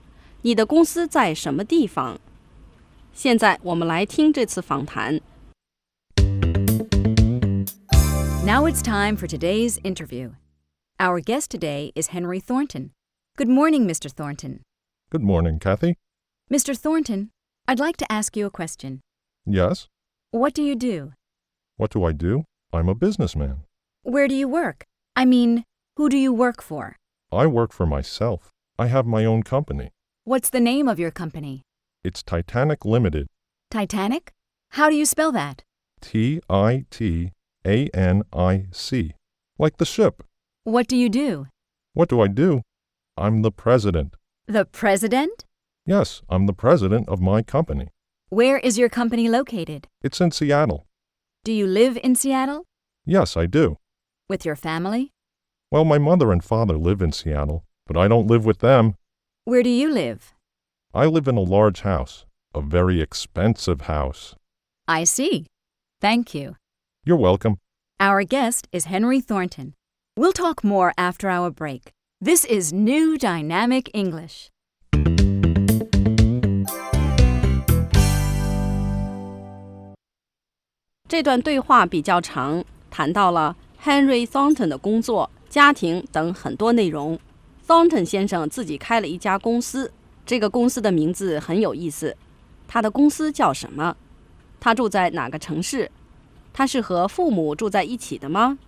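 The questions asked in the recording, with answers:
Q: 他的公司叫什么?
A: Henry 的公司叫 Titanic Limited

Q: 他住在哪个城市?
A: 西雅图(Seattle)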